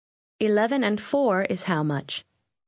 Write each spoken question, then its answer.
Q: 11 and 4 is how much?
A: 15.